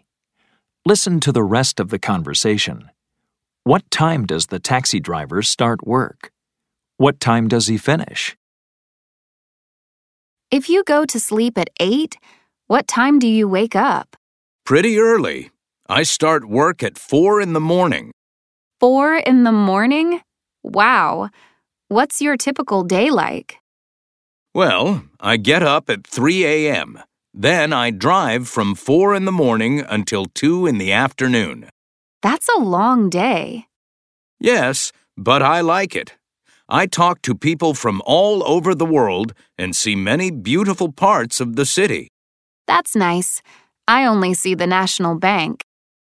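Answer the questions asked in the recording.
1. At 4 in the morning
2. At 2 in the afternoon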